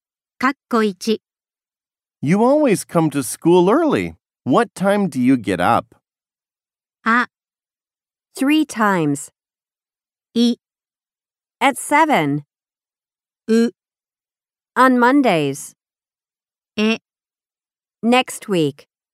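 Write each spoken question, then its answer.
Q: What time do you get up?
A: い: at 7.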